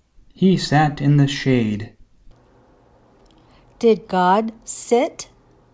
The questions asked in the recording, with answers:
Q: Did God sit?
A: No, Jonah sat.